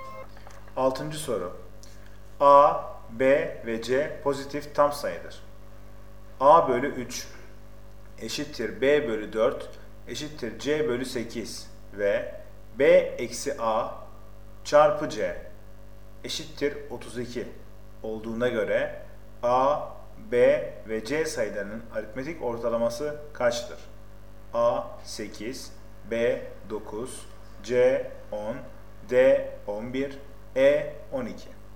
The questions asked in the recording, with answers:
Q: A bölü 3 eşittir B bölü 4 eşittir C bölü 8 ve B eksi A çarpı C eşittir 32 olduğuna göre A, B ve C sayılarının aritmetik ortalaması kaçtır?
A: Doğru cevap C 10.